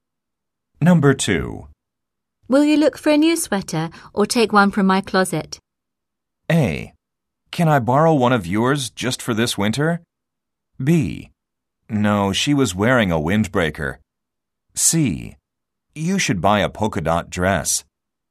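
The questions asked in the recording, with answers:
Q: Will you look for a new sweater or take one from my closet?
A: A: Can I borrow one of yours just for this winter?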